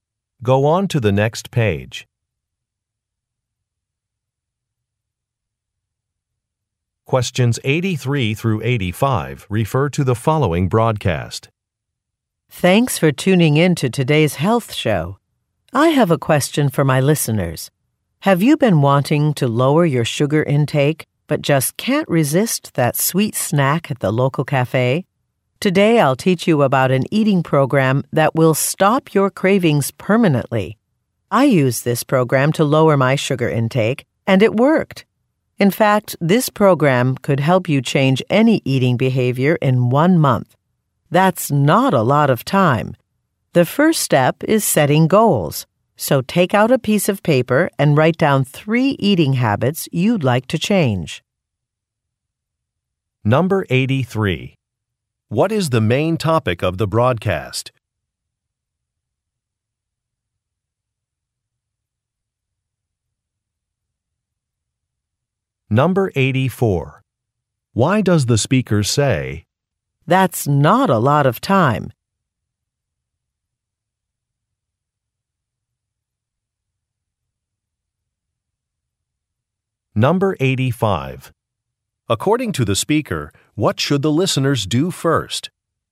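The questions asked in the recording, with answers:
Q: What is the main topic of the broadcast?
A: An eating program to reduce sugar cravings

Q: According to the speaker, what should the listeners do first?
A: Write down three eating habits to change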